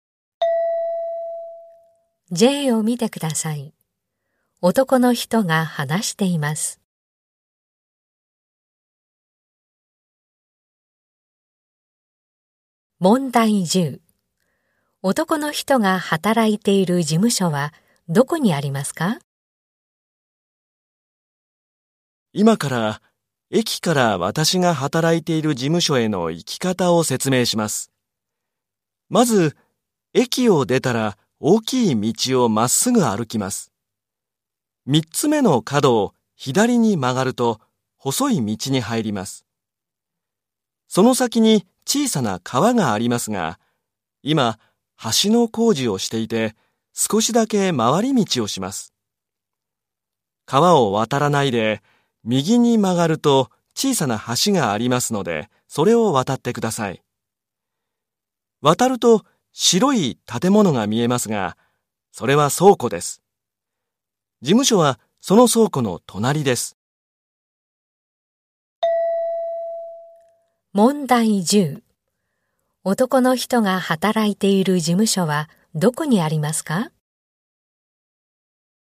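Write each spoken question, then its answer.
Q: 男の人が働いている事務所はどこにありますか?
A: 小さな橋を渡った先の倉庫の隣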